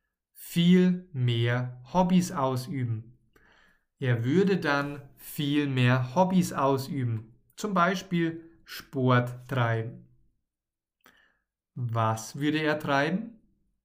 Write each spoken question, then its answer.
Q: Was würde er treiben?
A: Sport. Er würde Sport treiben.